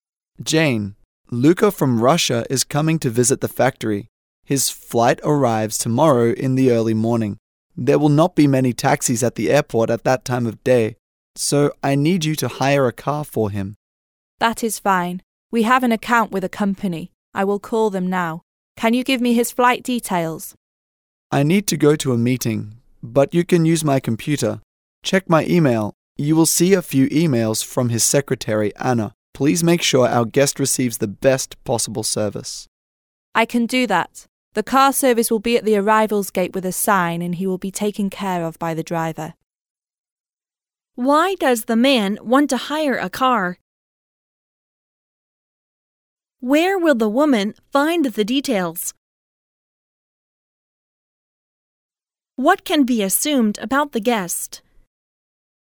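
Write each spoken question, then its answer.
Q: Why does the man want to hire a car?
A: There will not be many taxis at the airport early in the morning when the guest arrives

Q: Where will the woman find the details?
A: In the man's email on his computer (emails from the guest's secretary, Anna)

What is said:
[听力原文] M: Jane, Luka from Russia is coming to visit the factory. His flight arrives tomorrow in the early morning. There will not be many taxis at the airport at that time of day, so I need you to hire a car for him. W: That is fine. We have an account with a company. I will call them now. Can you give me his flight details? M: I need to go to a meeting, but you can use my computer. Check my e-mail—you will see a few e-mails from his secretary Ana. Please make sure our guest receives the best possible service. W: I can do that. The car service will be at the arrivals gate with a sign, and he will be taken care of by the driver.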